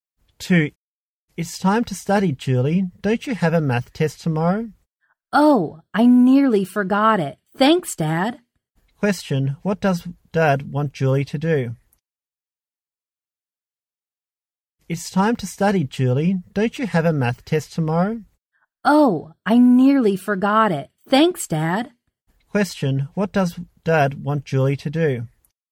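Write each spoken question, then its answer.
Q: What does Dad want Julie to do?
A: Study for her math test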